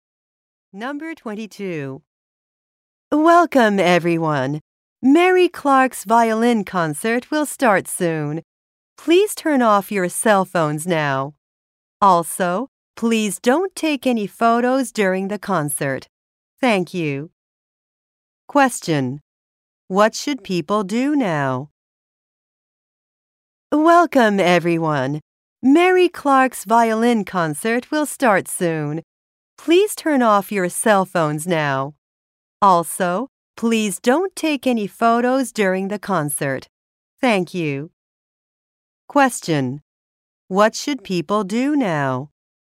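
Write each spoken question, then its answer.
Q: What should people do now?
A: Turn off their cell phones.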